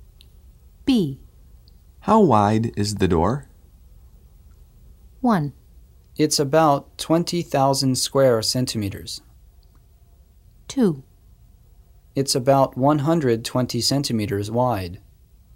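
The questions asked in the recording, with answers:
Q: How wide is the door?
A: 2: It's about 120 centimeters wide.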